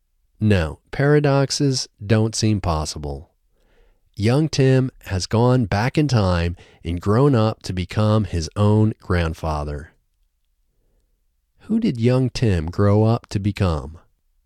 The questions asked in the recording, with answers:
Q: Who did young Tim grow up to become?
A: Young Tim grew up to become his own grandfather.